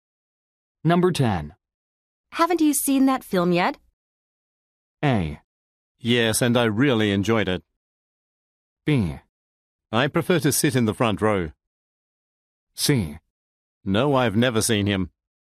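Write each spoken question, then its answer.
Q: Haven't you seen that film yet?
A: A: Yes, and I really enjoyed it.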